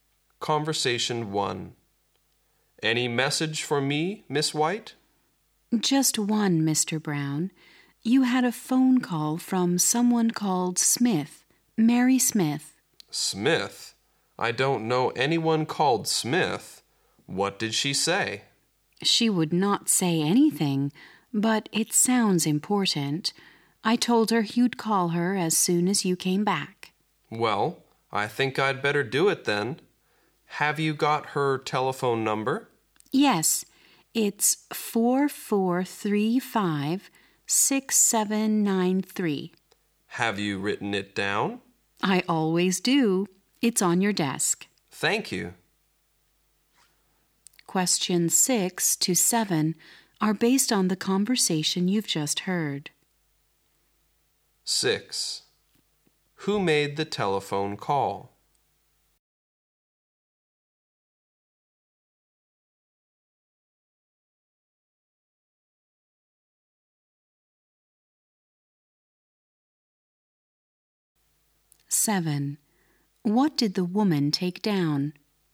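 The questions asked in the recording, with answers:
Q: Who made the telephone call?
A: Mary Smith

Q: What did the woman take down?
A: Mary Smith's telephone number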